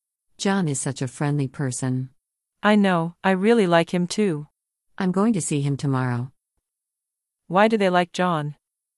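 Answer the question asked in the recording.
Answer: He is very friendly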